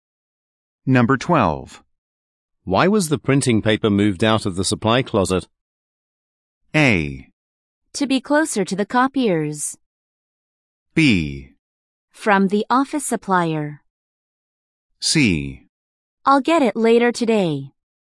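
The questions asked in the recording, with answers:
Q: Why was the printing paper moved out of the supply closet?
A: A: To be closer to the copiers.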